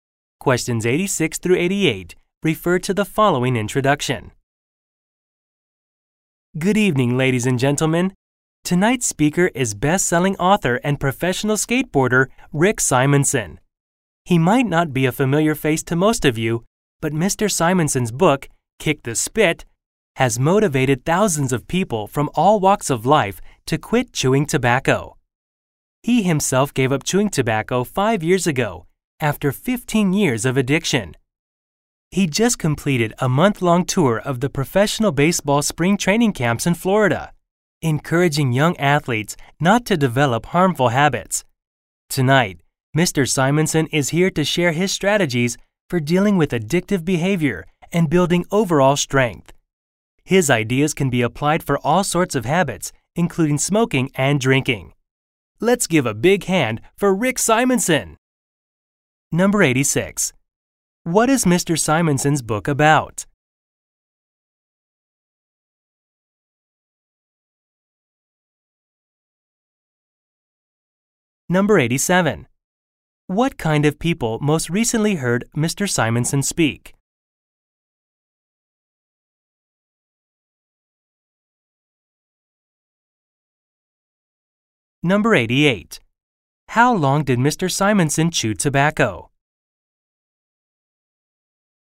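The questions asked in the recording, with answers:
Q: What is Mr. Simonson's book about?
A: Quitting chewing tobacco

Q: What kind of people most recently heard Mr.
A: Young baseball players

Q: How long did Mr. Simonson chew tobacco?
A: 15 years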